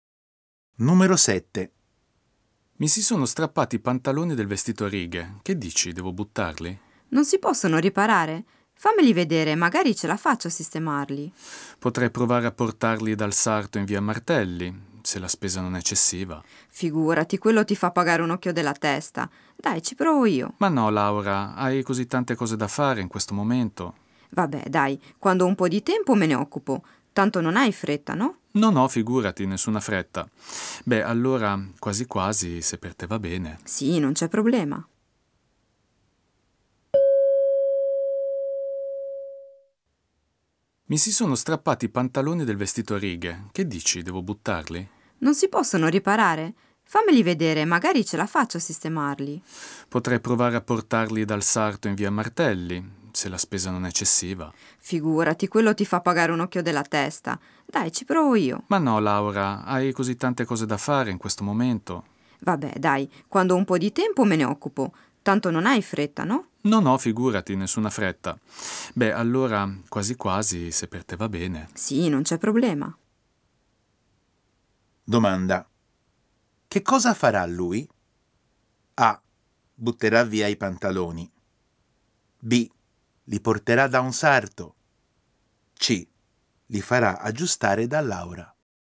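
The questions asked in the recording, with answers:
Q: Che cosa farà lui?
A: C: Li farà aggiustare da Laura.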